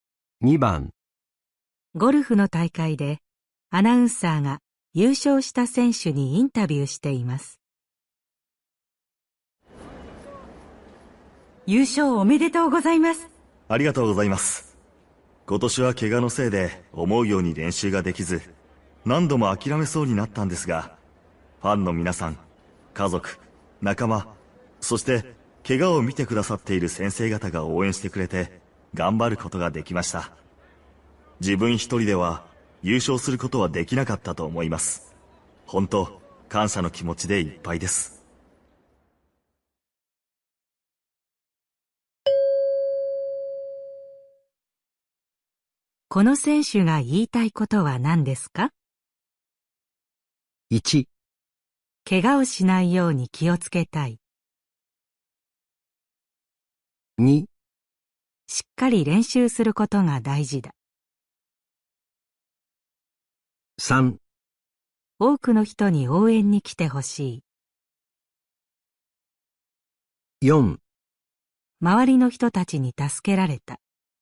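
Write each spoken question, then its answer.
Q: この選手が言いたいことは何ですか?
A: 4: 周りの人たちに助けられた。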